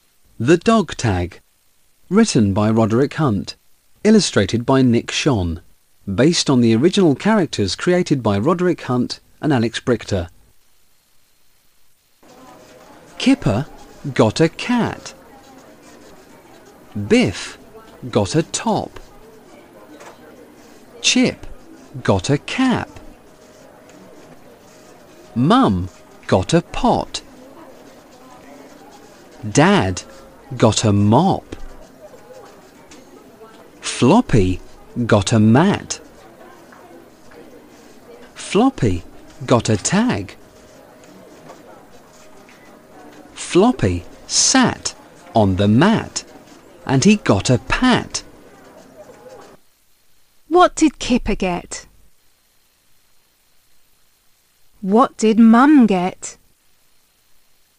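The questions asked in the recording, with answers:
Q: What did Kipper get?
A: a cat

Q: What did Mum get?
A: a pot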